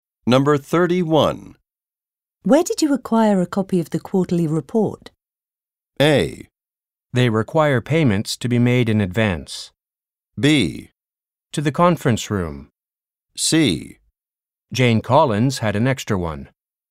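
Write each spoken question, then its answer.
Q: Where did you acquire a copy of the quarterly report?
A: C: Jane Collins had an extra one.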